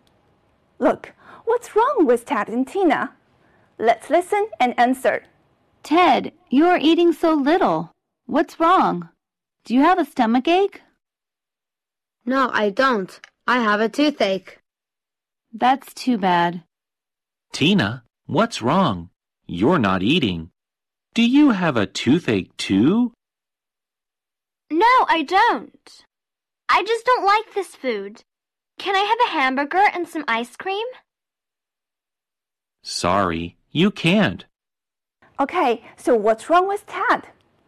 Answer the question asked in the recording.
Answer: Yes, Ted has a toothache.